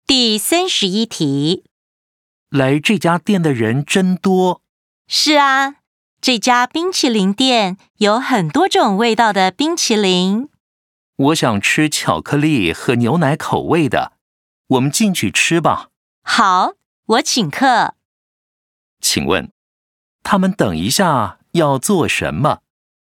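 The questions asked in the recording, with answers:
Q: 请问,他们等一下要做什么?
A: 进店吃冰淇淋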